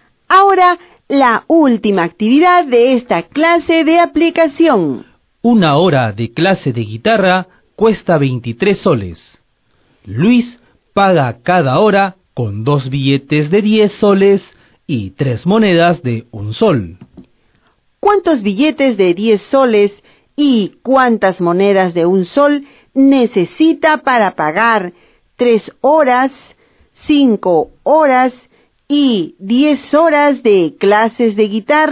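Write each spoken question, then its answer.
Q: ¿Cuántos billetes de 10 soles y cuántas monedas de 1 sol necesita para pagar 3 horas, 5 horas y 10 horas de clases de guitarra?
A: 3 horas: 6 billetes y 9 monedas; 5 horas: 10 billetes y 15 monedas; 10 horas: 20 billetes y 30 monedas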